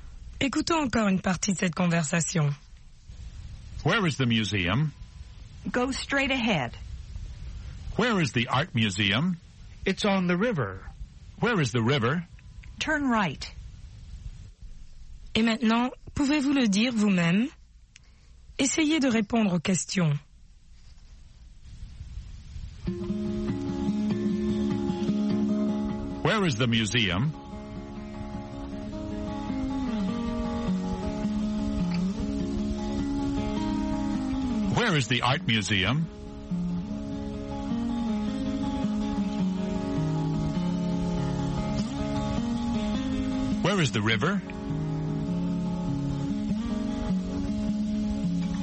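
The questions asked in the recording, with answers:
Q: Where is the museum?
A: Go straight ahead.

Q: Where is the art museum?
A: It's on the river.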